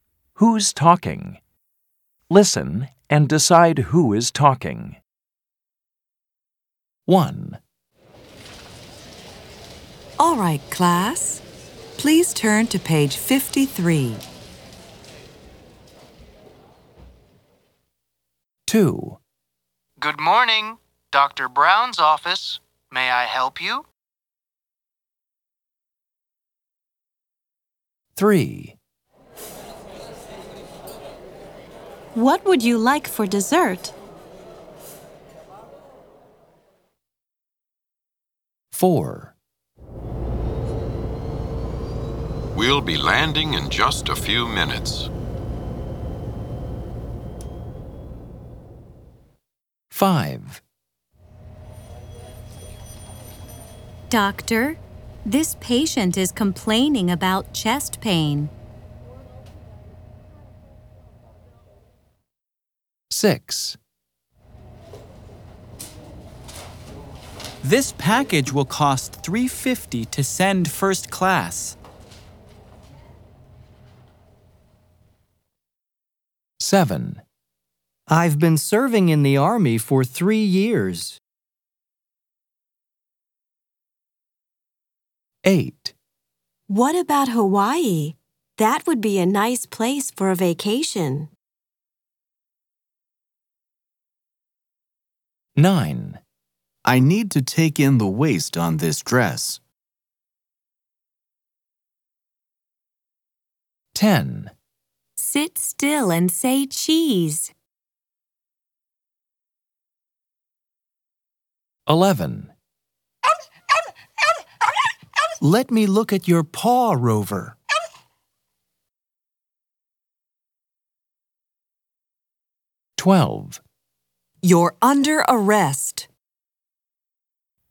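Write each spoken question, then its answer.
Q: Who's talking?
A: a teacher

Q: Who's talking?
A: a receptionist at a doctor's office

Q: Who's talking?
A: a nurse

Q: Who's talking?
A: a postal clerk

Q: Who's talking?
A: a soldier

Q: Who's talking?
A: a tailor or seamstress

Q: Who's talking?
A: a photographer

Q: Who's talking?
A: a veterinarian

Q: Who's talking?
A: a police officer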